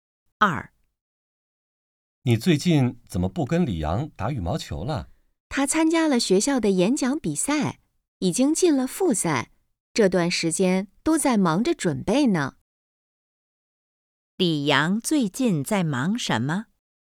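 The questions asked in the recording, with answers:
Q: 李阳最近在忙什么?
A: 准备演讲比赛复赛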